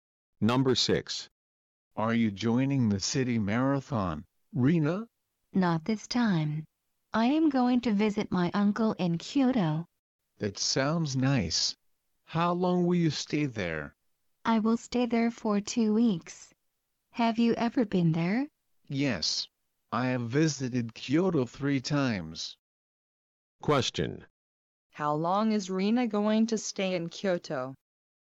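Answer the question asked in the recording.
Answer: For 2 weeks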